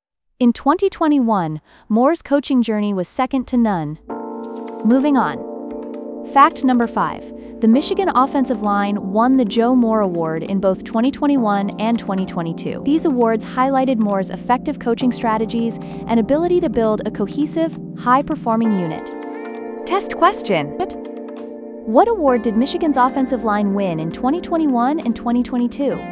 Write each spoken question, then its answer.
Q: What award did Michigan's offensive line win in 2021 and 2022?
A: Correct answer. Joe Moore Award.